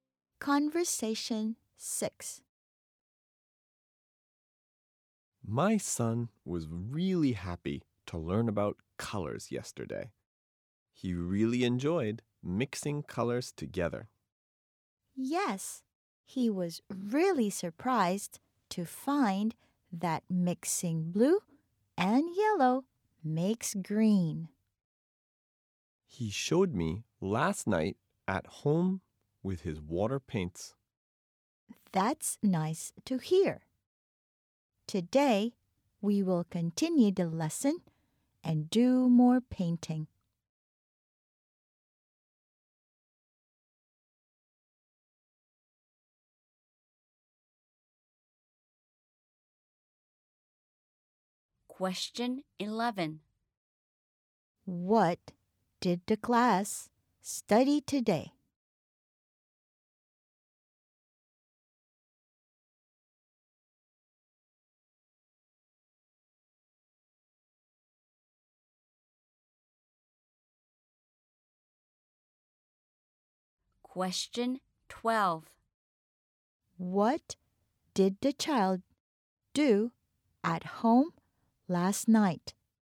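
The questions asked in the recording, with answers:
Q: What did the child do at home last night?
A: Mixed colors with his water paints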